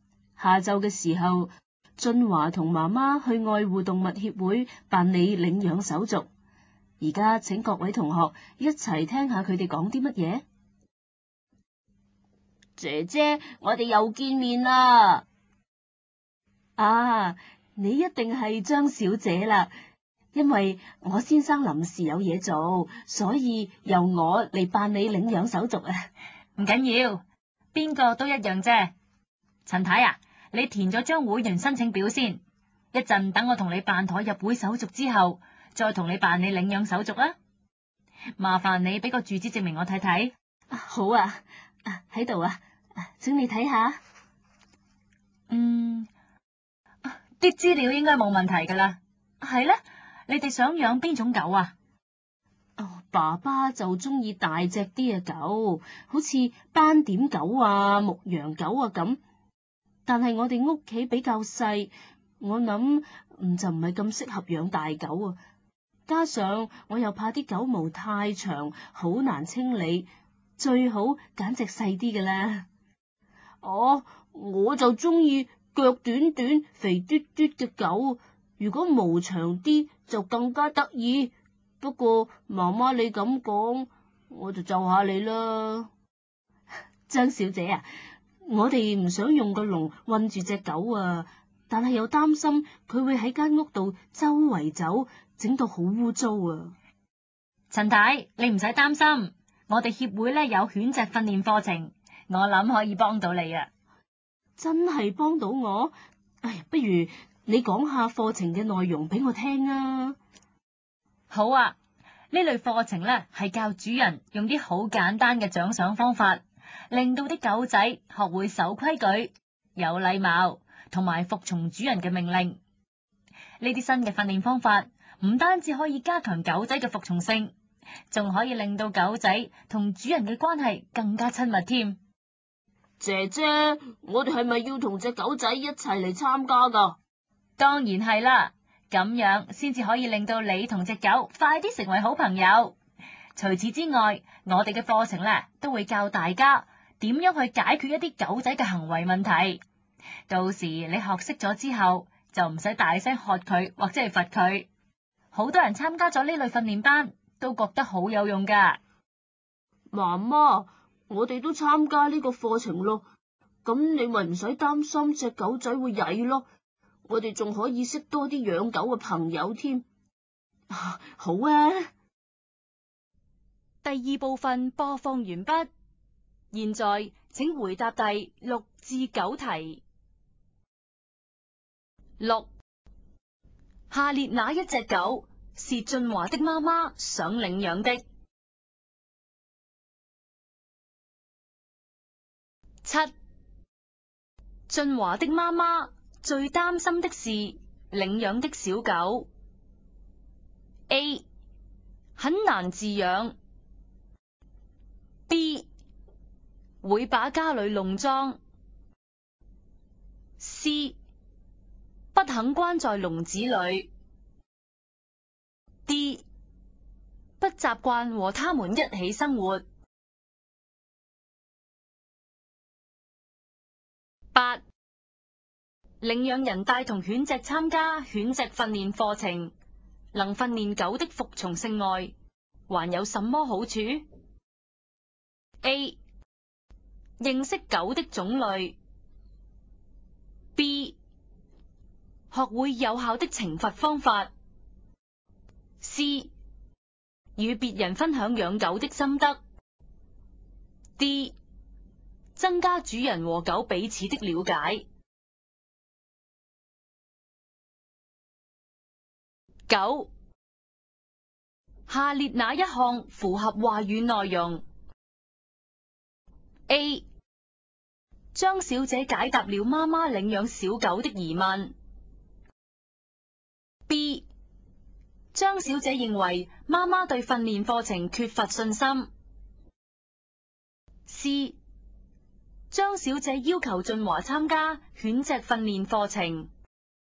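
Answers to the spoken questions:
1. B: 会把家里弄脏。
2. D: 增加主人和狗彼此的了解。
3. A: 张小姐解答了妈妈领养小狗的疑问。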